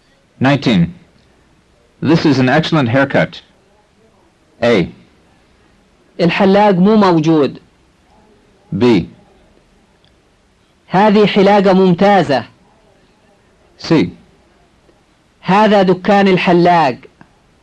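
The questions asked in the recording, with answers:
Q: This is an excellent haircut.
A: B: هذه حلاقة ممتازة.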